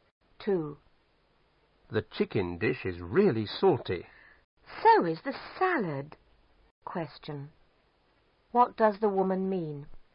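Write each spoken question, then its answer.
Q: What does the woman mean?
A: The salad is salty too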